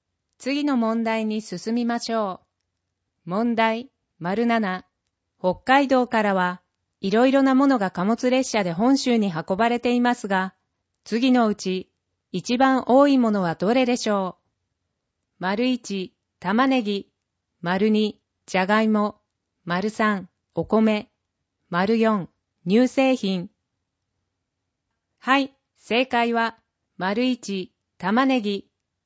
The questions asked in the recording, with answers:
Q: 北海道からはいろいろなものが貨物列車で本州に運ばれていますが、次のうち一番多いものはどれでしょう?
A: 正解は1、玉ねぎ